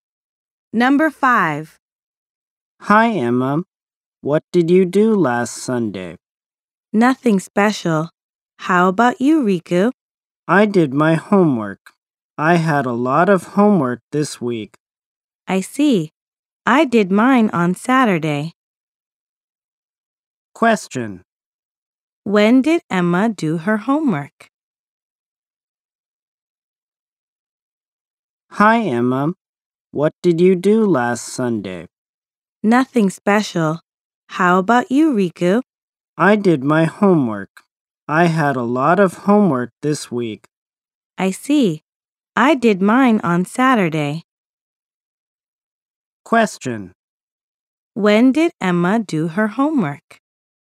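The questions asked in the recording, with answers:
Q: When did Emma do her homework?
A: On Saturday.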